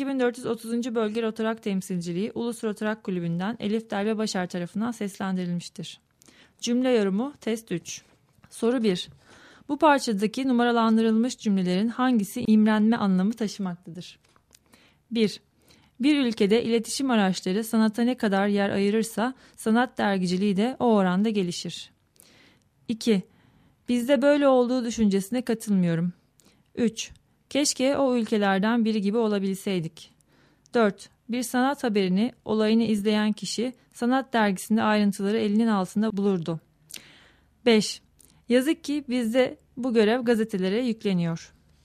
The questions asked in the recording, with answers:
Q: Bu parçadaki numaralandırılmış cümlelerin hangisi imrenme anlamı taşımaktadır?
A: Doğru cevap C şıkkı.